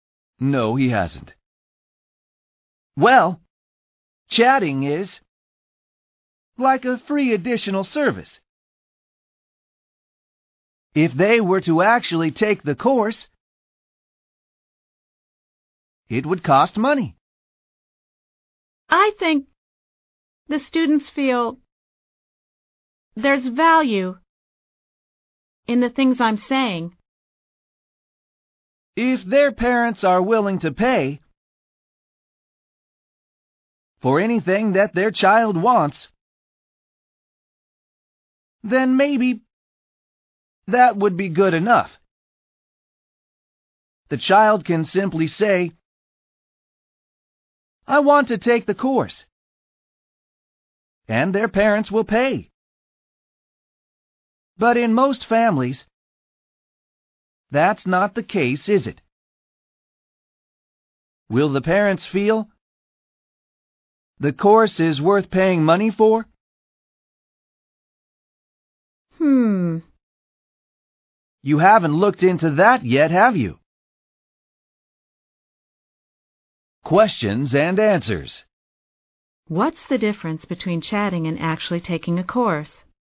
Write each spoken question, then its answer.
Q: What's the difference between chatting and actually taking a course?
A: Taking a course would cost money.